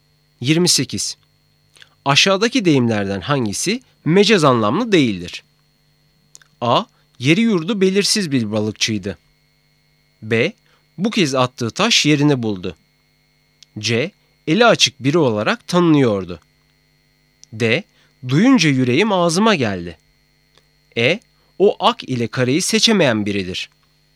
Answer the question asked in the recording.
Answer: Doğru cevap A, yeri yurdu belirsiz bir balıkçıydı.